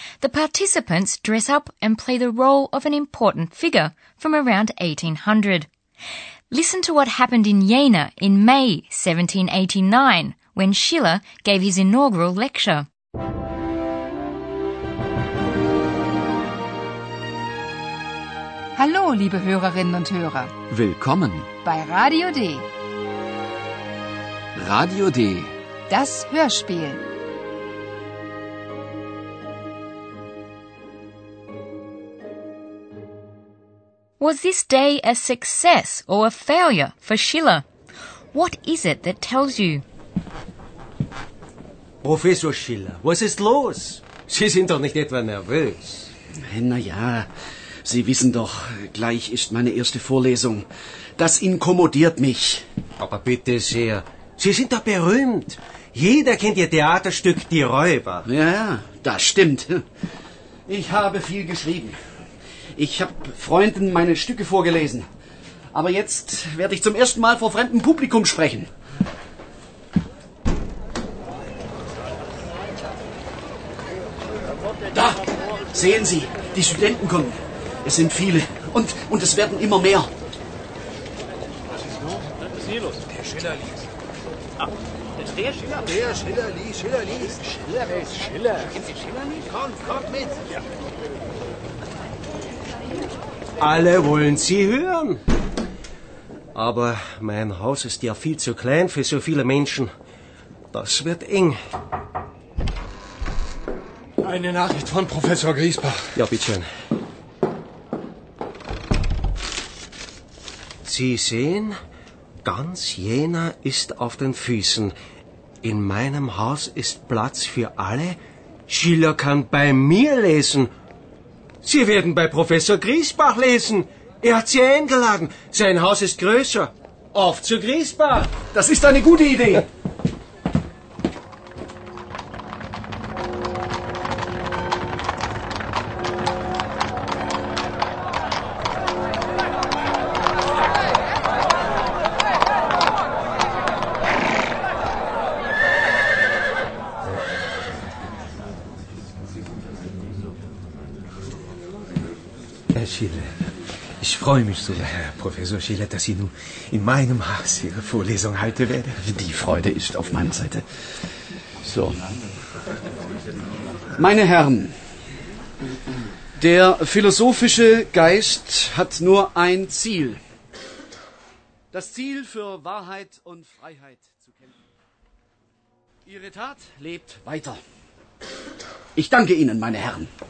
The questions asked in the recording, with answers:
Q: Was this day a success or a failure for Schiller?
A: You can tell that the atmosphere is one of approval.